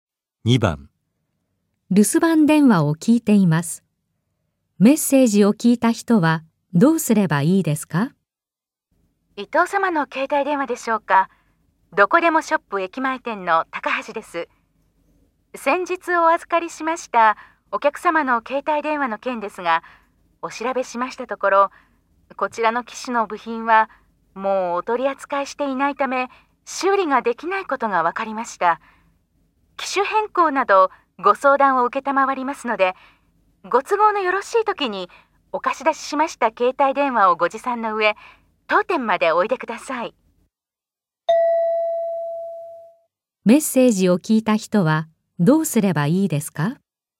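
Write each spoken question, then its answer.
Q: メッセージを聞いた人はどうすればいいですか?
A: 借りた携帯電話を持って店に行く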